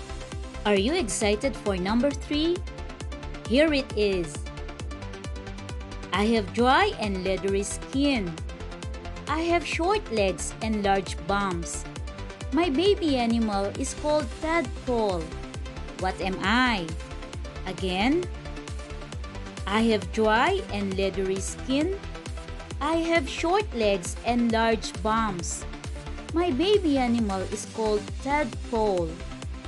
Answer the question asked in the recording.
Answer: Okay, the answer is toad.